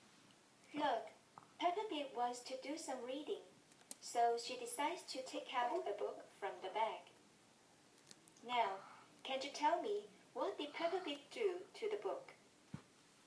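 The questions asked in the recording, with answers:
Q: Now, can you tell me what did Peppa Pig do to the book?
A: She took the book out of the bag.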